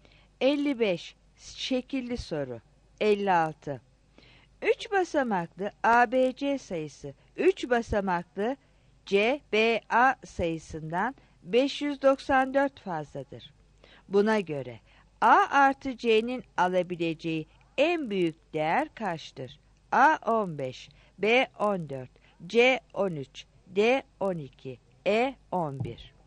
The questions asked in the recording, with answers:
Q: Buna göre A artı C'nin alabileceği en büyük değer kaçtır?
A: 56 D